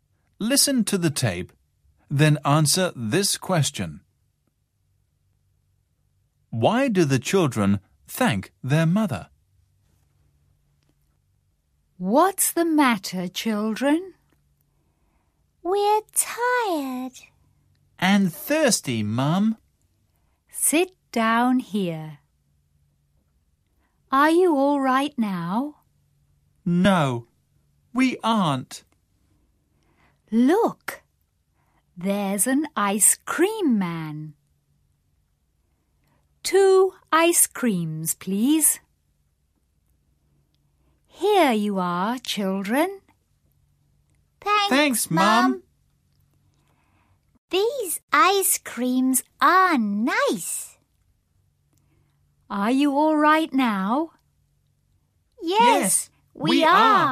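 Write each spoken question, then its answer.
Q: Why do the children thank their mother?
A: Because she buys them ice creams.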